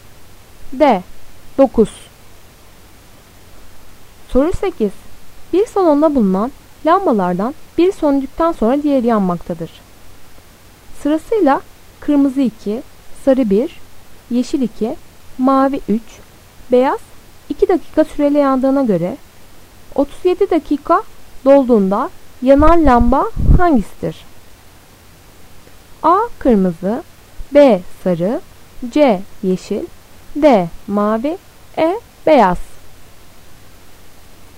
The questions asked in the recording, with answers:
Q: Sırasıyla kırmızı 2, sarı 1, yeşil 2, mavi 3, beyaz 2 dakika süreyle yandığına göre 37 dakika dolduğunda yanan lamba hangisidir?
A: Doğru cevap D. Mavi.